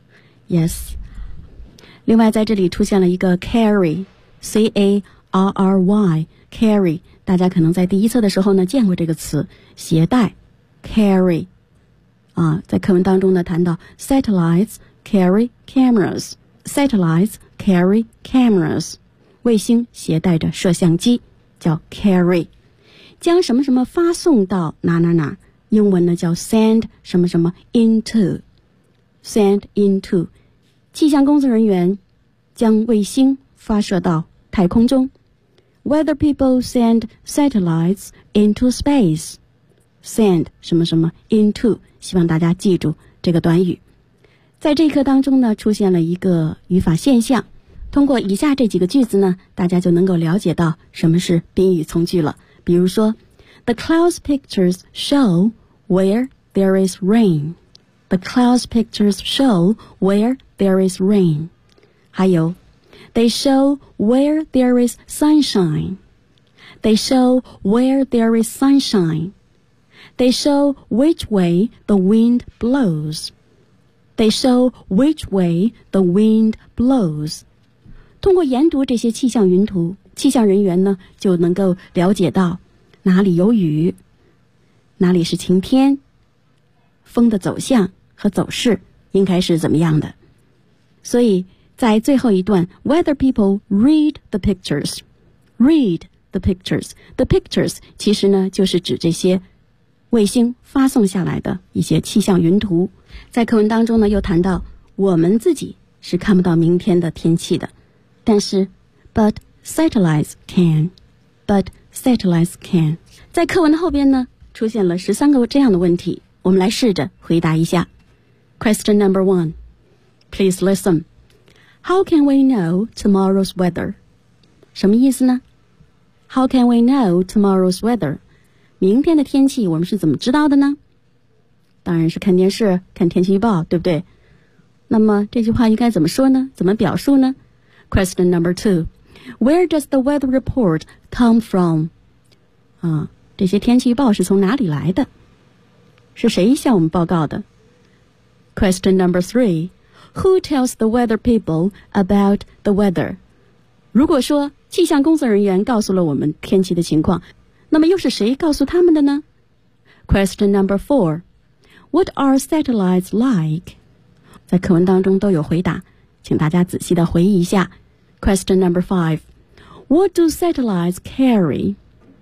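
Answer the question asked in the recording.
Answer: Cameras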